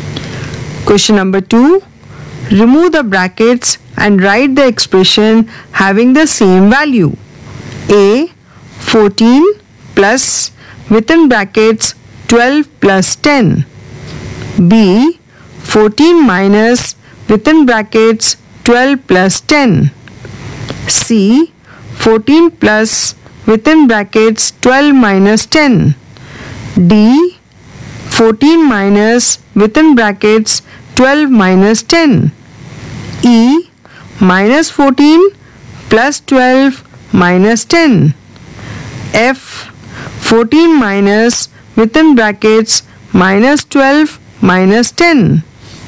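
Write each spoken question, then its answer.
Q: A. 14 plus within brackets 12 plus 10.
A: 14 + 12 + 10

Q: B. 14 minus within brackets 12 plus 10.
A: 14 − 12 − 10

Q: C. 14 plus within brackets 12 minus 10.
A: 14 + 12 − 10

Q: D. 14 minus within brackets 12 minus 10.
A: 14 − 12 + 10

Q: F. 14 minus within brackets minus 12 minus 10.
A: 14 + 12 + 10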